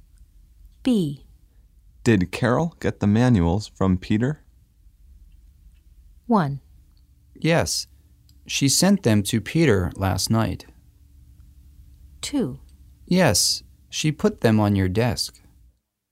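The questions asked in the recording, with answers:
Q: Did Carol get the manuals from Peter?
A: 2: Yes, she put them on your desk.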